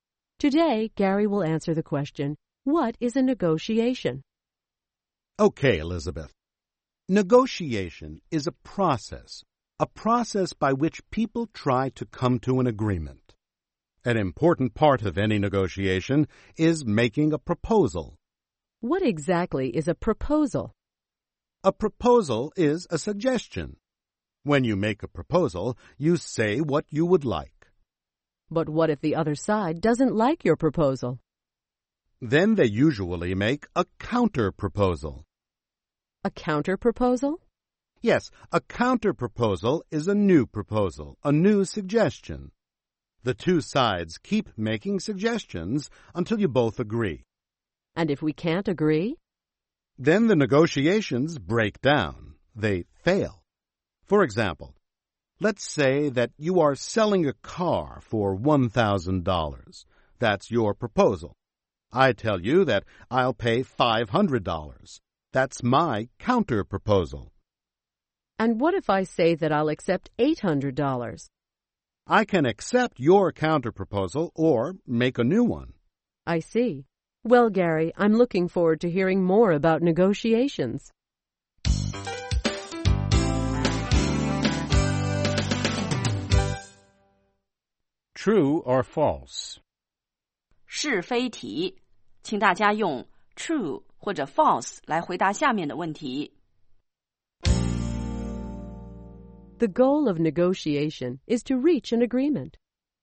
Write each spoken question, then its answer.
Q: The goal of negotiation is to reach an agreement.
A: True. People offer proposals and counterproposals in an attempt to reach an agreement.